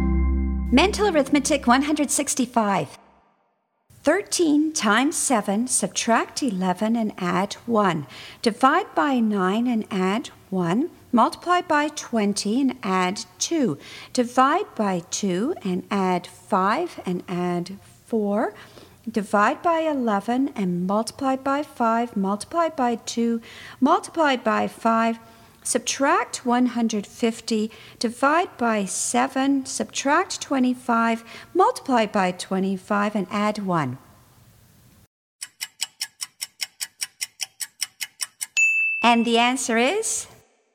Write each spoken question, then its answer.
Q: 13 times 7, subtract 11 and add 1. Divide by 9 and add 1. Multiply by 20 and add 2. Divide by 2 and add 5 and add 4. Divide by 11 and multiply by 5. Multiply by 2. Multiply by 5. Subtract 150, divide by 7, subtract 25, multiply by 25, and add 1.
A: 626.